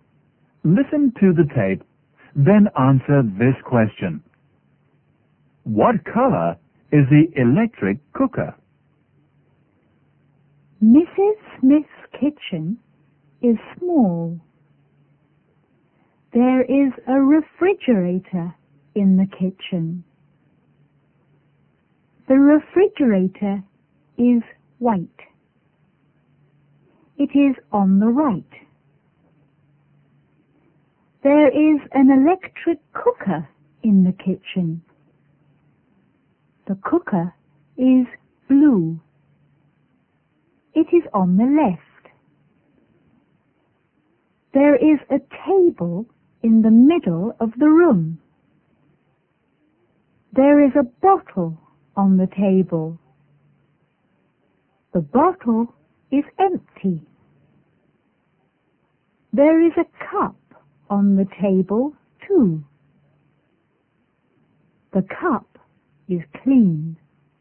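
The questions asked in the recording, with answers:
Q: What color is the electric cooker?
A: Blue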